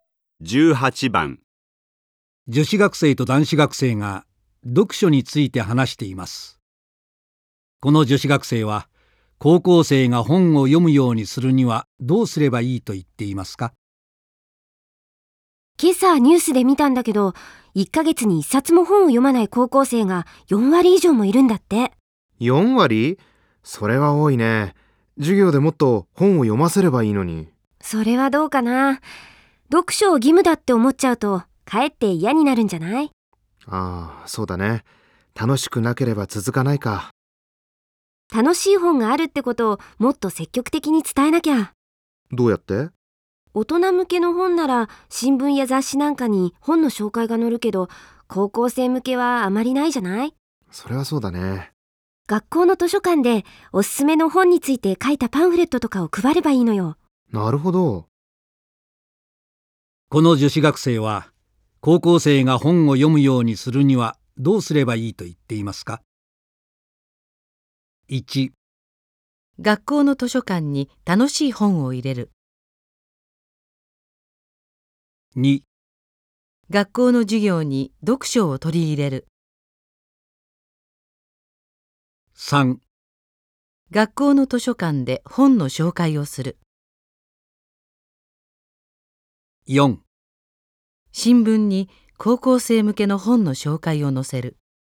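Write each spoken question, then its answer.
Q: この女子学生は、高校生が本を読むようにするにはどうすればいいと言っていますか?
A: 3: 学校の図書館で本の紹介をする。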